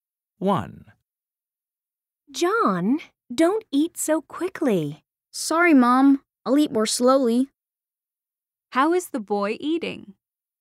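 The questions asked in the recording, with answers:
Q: How is the boy eating?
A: quickly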